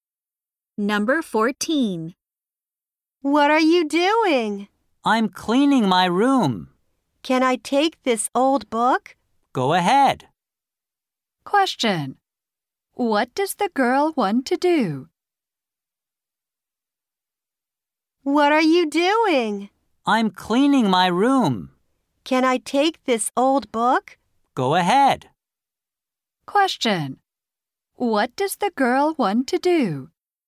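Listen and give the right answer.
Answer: Take an old book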